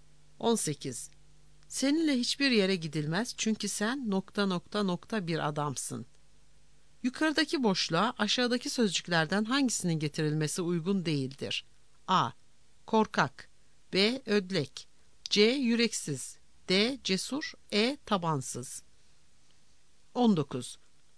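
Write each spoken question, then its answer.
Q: Yukarıdaki boşluğa aşağıdaki sözcüklerden hangisinin getirilmesi uygun değildir?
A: D: Cesur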